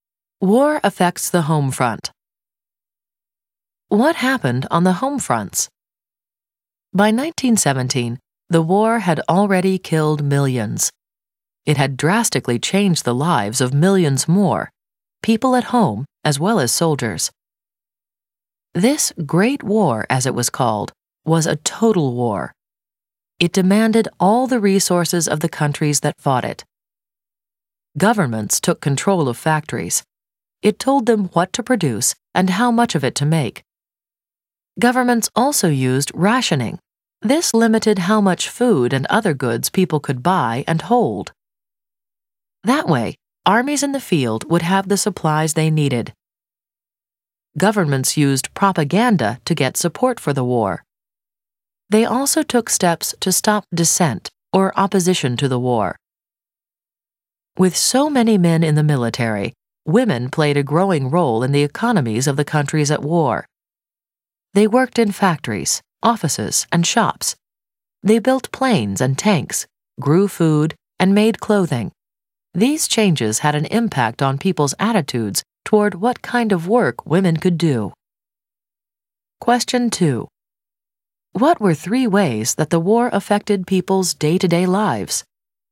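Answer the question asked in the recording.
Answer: Governments controlled factories, rationing, propaganda and limits on dissent; women worked in factories, offices and shops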